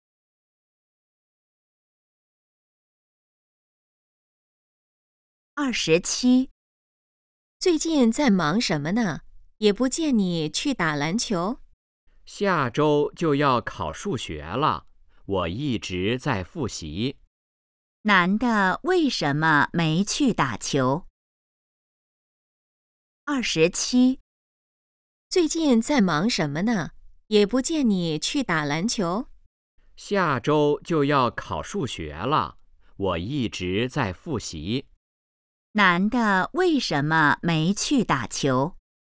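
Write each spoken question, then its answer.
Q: 男的为什么没去打球?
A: 在复习,准备数学考试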